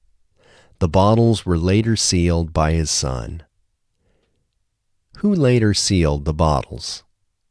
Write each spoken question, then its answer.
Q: Who later sealed the bottles?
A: His son later sealed the bottles.